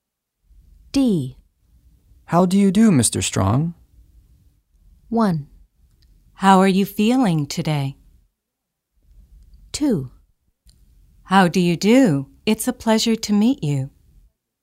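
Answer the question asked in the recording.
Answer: 2: How do you do? It's a pleasure to meet you.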